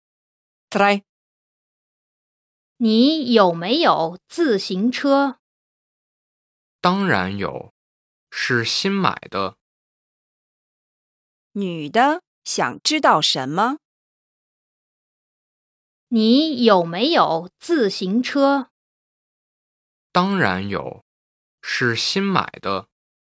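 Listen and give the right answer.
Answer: 男的有没有自行车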